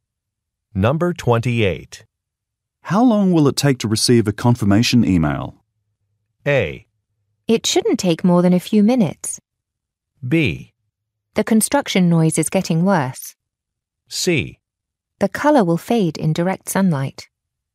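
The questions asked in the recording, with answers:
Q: How long will it take to receive a confirmation email?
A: A: It shouldn't take more than a few minutes.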